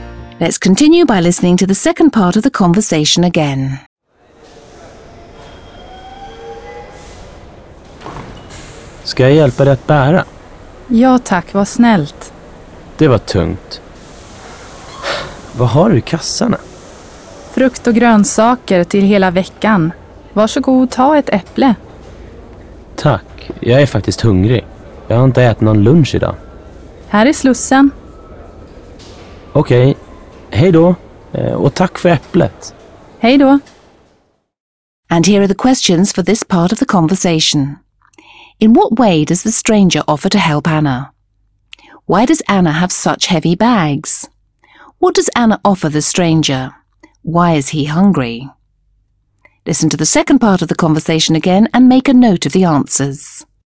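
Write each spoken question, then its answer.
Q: In what way does the stranger offer to help Anna?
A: He offers to carry her bags

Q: Why does Anna have such heavy bags?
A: She has fruit and vegetables for the whole week

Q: What does Anna offer the stranger?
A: An apple

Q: Why is he hungry?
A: He hasn't eaten any lunch today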